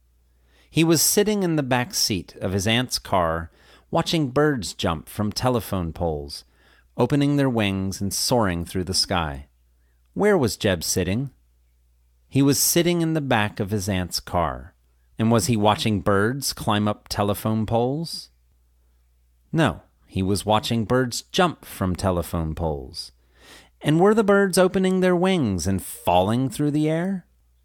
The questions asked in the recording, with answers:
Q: Where was Jeb sitting?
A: He was sitting in the back of his aunt's car.

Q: And were the birds opening their wings and falling through the air?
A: No, they were opening their wings and soaring through the air.